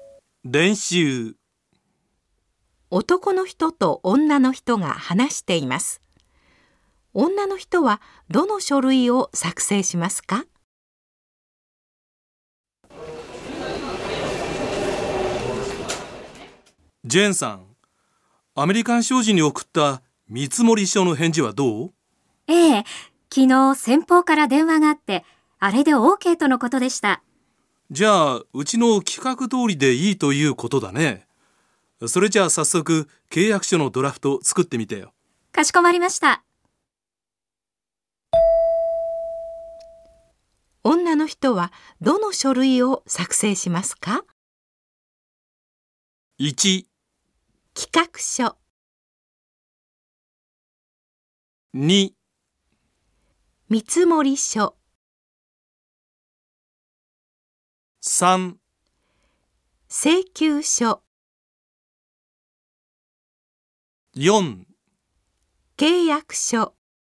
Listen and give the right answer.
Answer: 正しい答えは4です。